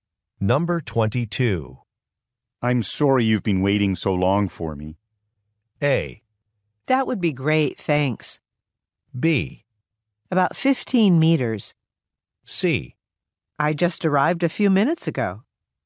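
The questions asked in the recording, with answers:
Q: I'm sorry you've been waiting so long for me.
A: C: I just arrived a few minutes ago.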